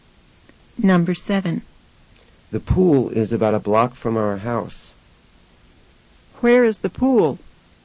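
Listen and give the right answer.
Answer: About a block from our house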